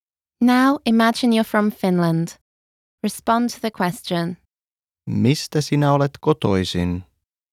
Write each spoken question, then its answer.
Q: Mistä sinä olet kotoisin?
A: Olen kotoisin Suomesta.